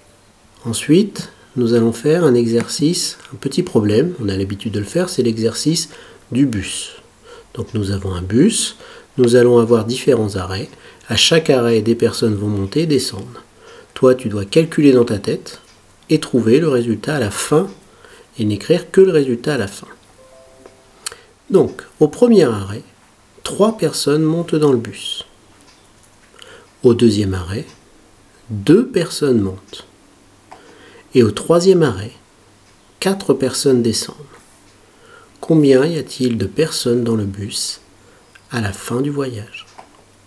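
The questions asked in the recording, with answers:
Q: Combien y a-t-il de personnes dans le bus à la fin du voyage ?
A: 1 personne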